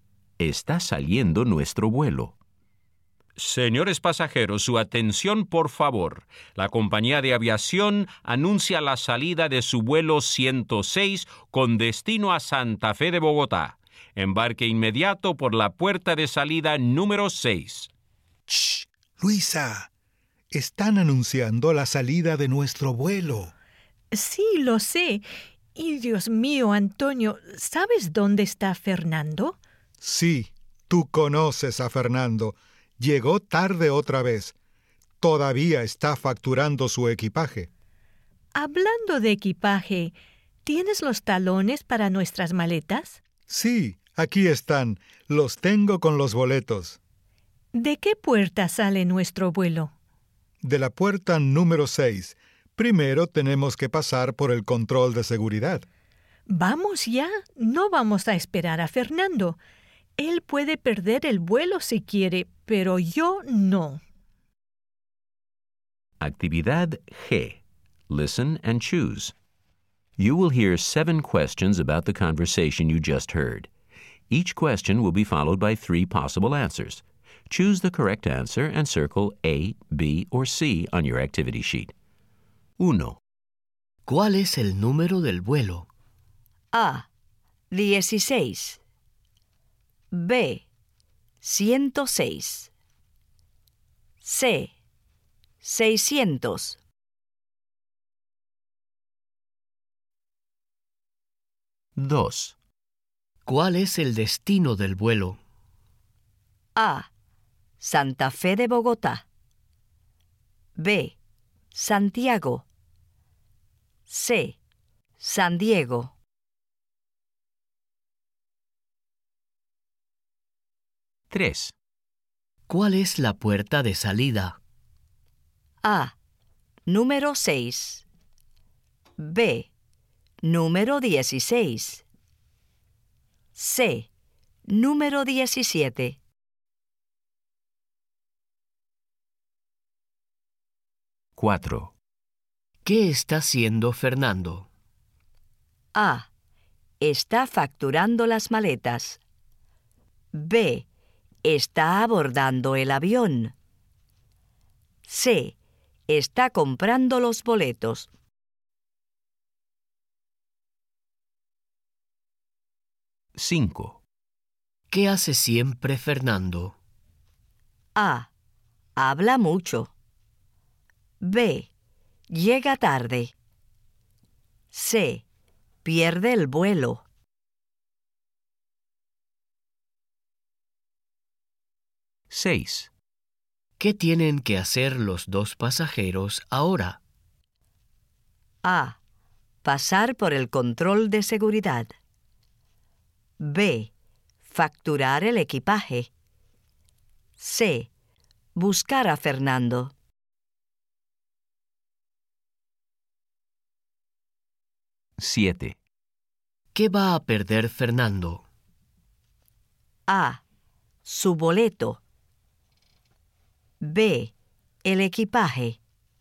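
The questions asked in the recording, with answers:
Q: ¿Cuál es el número del vuelo?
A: B: 106

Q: ¿Cuál es el destino del vuelo?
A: A: Santa Fe de Bogotá

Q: ¿Cuál es la puerta de salida?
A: A: Número 6

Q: ¿Qué está haciendo Fernando?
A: A: Está facturando las maletas

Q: ¿Qué hace siempre Fernando?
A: B: Llega tarde

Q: ¿Qué tienen que hacer los dos pasajeros ahora?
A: A: Pasar por el control de seguridad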